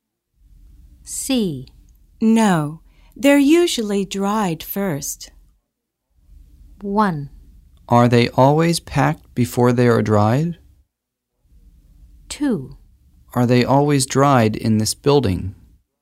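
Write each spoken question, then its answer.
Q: No, they're usually dried first.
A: 1: Are they always packed before they are dried?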